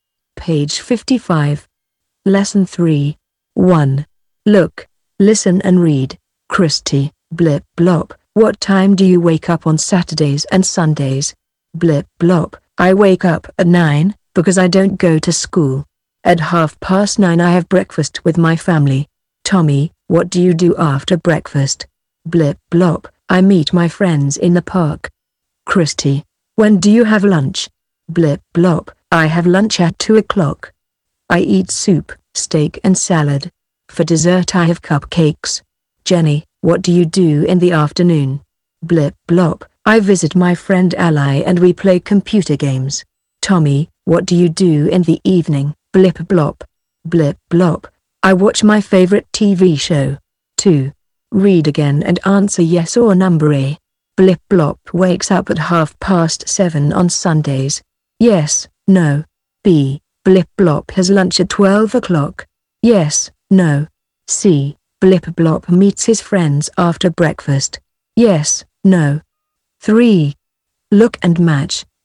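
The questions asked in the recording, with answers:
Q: Blip blop wakes up at 7:30 on Sundays.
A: No

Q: Blip blop has lunch at 12 o'clock.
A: No

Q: Blip blop meets his friends after breakfast.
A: Yes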